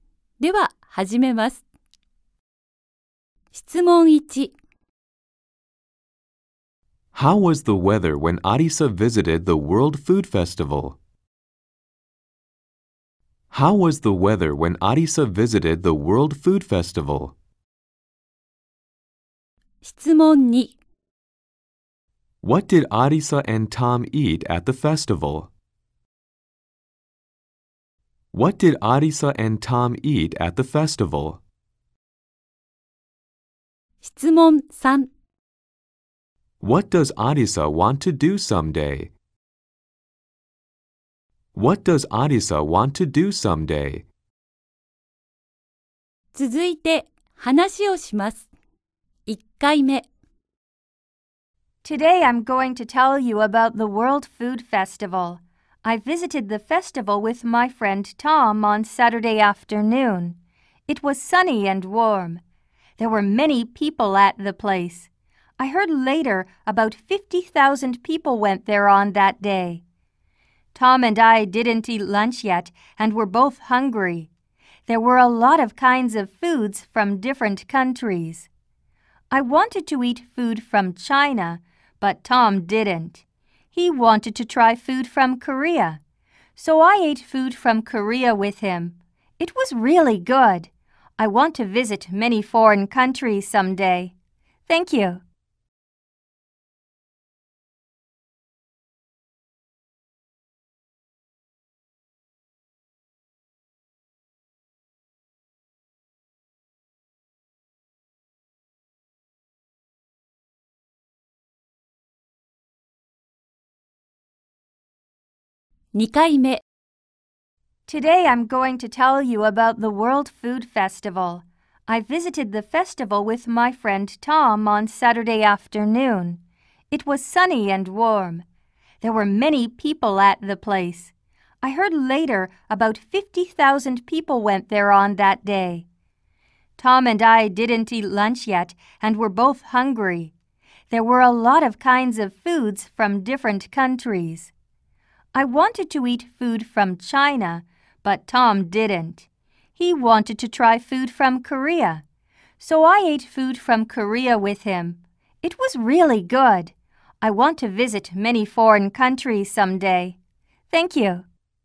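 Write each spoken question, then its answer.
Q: How was the weather when Arisa visited the World Food Festival?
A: It was sunny and warm

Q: What did Arisa and Tom eat at the festival?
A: Food from Korea

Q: What does Arisa want to do someday?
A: Visit many foreign countries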